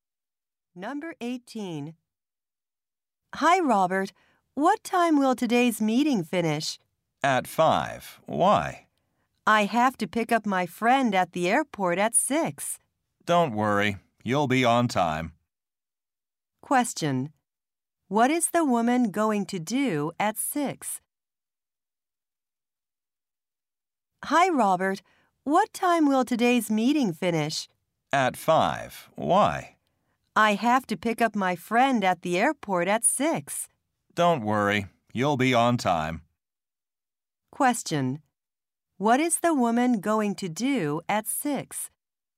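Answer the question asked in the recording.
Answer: Pick up her friend at the airport.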